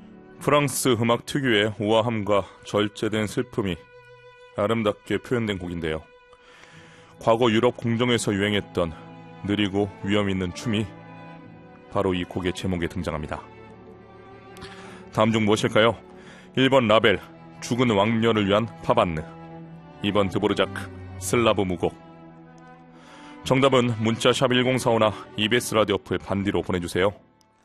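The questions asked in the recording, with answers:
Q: 다음 중 무엇일까요?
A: 1: 라벨, 죽은 왕녀를 위한 파반느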